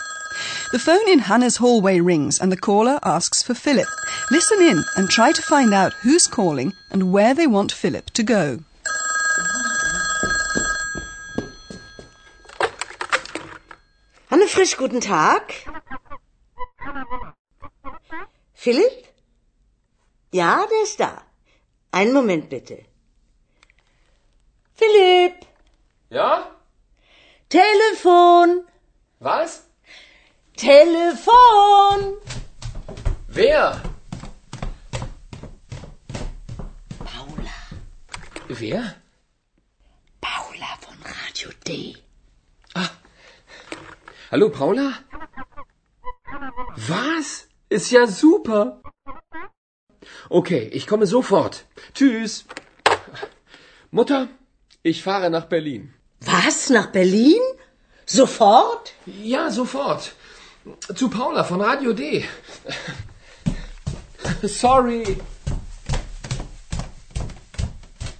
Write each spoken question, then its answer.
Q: Listen in and try to find out who's calling and where they want Philip to go.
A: A woman called Paula has rung, and she's apparently with a broadcaster called Radio D.